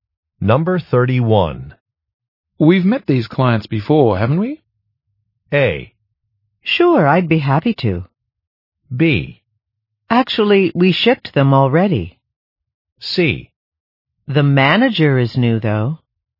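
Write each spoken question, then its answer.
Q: We've met these clients before, haven't we?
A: C: The manager is new, though.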